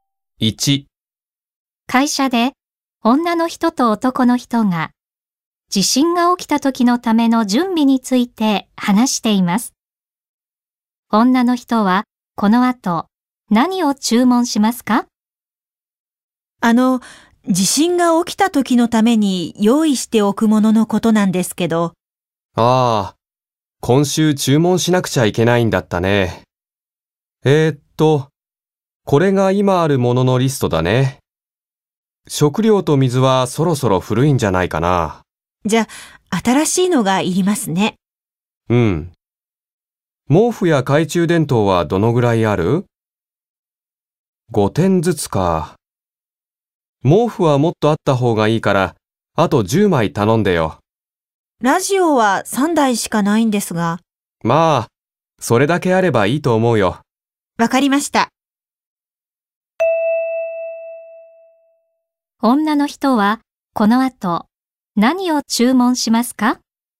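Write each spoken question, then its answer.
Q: 女の人はこの後何を注文しますか?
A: 食料と水と毛布10枚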